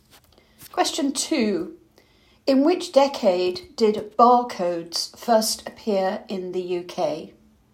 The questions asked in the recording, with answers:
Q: In which decade did barcodes first appear in the UK?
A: the 1970s.